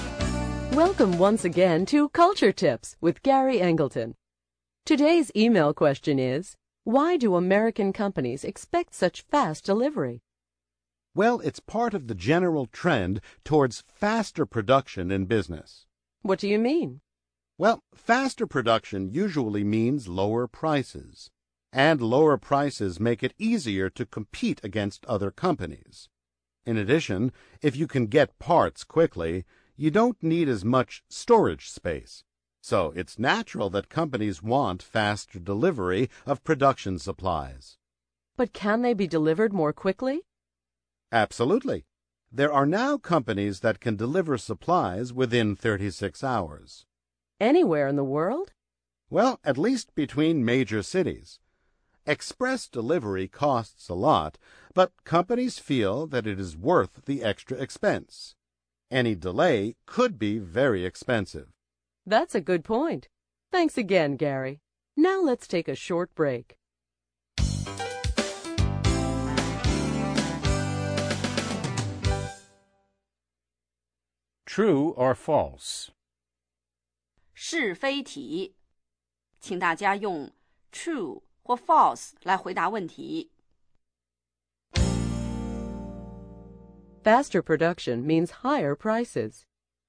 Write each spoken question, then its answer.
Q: Faster production means higher prices.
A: False. Faster production usually means lower prices.